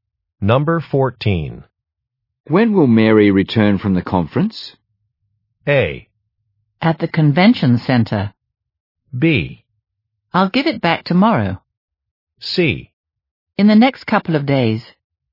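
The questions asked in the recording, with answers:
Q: When will Mary return from the conference?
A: C: In the next couple of days.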